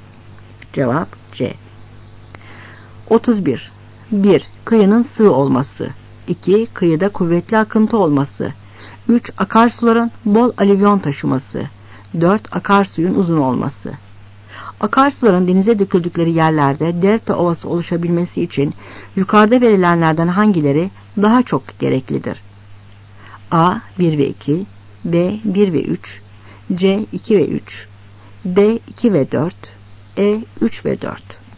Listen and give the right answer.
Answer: Cevap B.